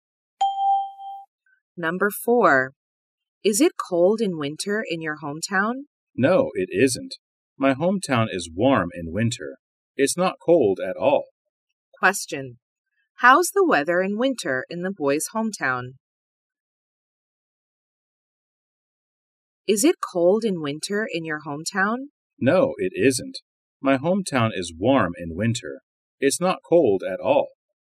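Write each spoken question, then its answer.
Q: How's the weather in winter in the boy's hometown?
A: Warm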